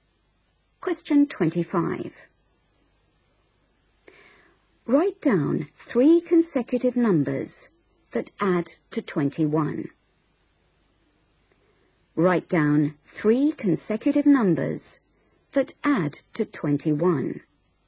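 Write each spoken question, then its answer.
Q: Write down 3 consecutive numbers that add to 21.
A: 6, 7, 8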